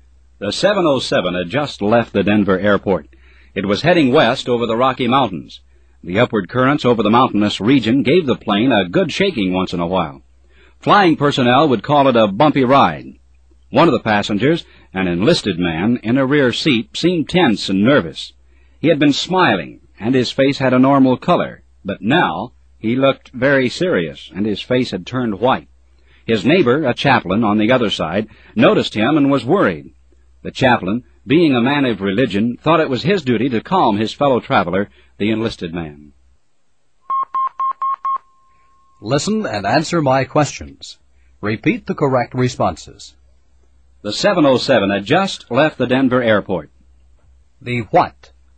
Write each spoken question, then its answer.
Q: The what?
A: 707.